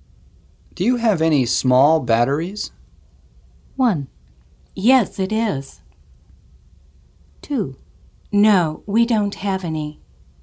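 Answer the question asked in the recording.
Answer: 2: No, we don't have any.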